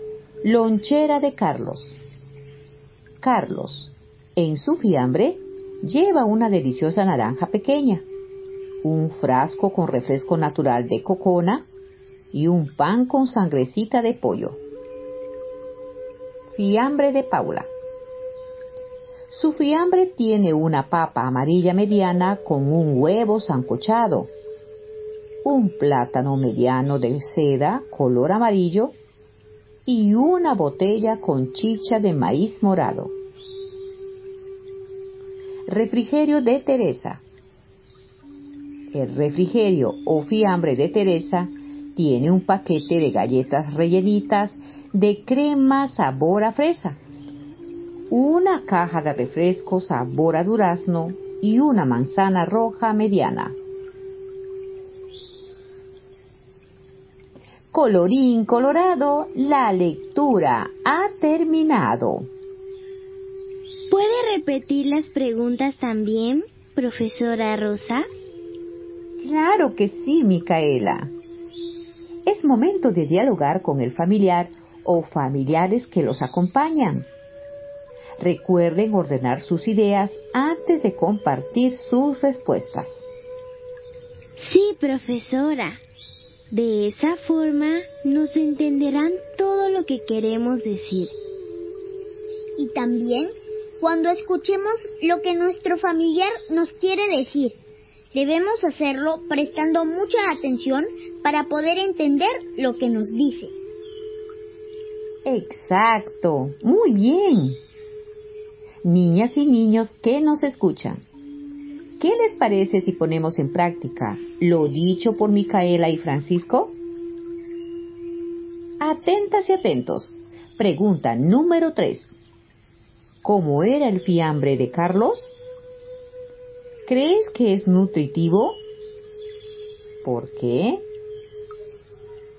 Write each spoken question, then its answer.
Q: ¿Cómo era el fiambre de Carlos?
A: Sí, el fiambre de Carlos tenía una rica naranja pequeña, un pan con sangrecita de pollo y refresco natural de cocona.